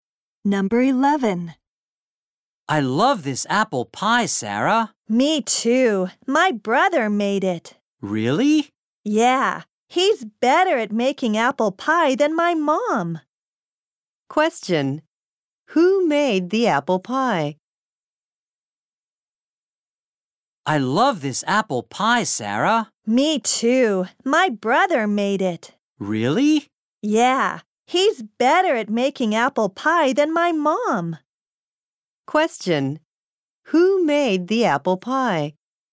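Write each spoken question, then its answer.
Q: Who made the apple pie?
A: Sarah's brother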